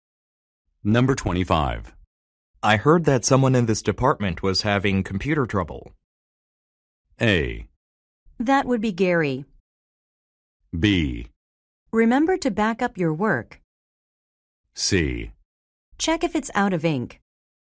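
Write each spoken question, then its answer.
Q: I heard that someone in this department was having computer trouble.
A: A: That would be Gary.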